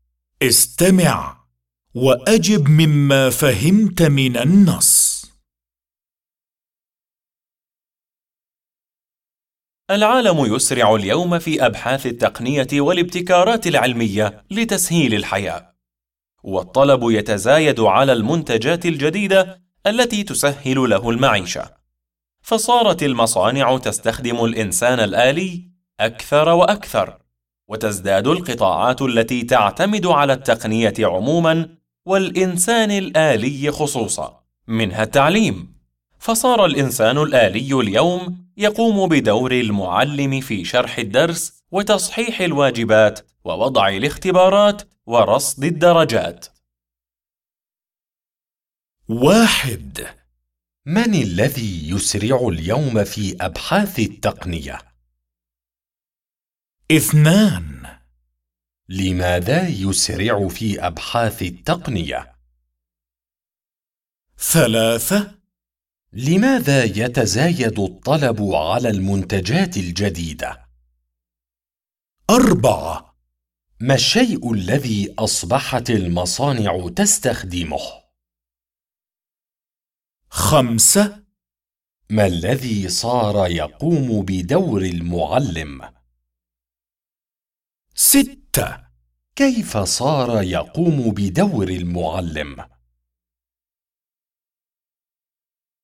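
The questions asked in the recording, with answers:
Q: من الذي يسرع اليوم في أبحاث التقنية؟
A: العالم

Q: لماذا يسرع في أبحاث التقنية؟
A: لتسهيل الحياة

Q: لماذا يتزايد الطلب على المنتجات الجديدة؟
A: لأنها تسهل المعيشة

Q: ما الشيء الذي أصبحت المصانع تستخدمه؟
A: الإنسان الآلي

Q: ما الذي صار يقوم بدور المعلم؟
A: الإنسان الآلي

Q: كيف صار يقوم بدور المعلم؟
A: بشرح الدرس وتصحيح الواجبات ووضع الاختبارات ورصد الدرجات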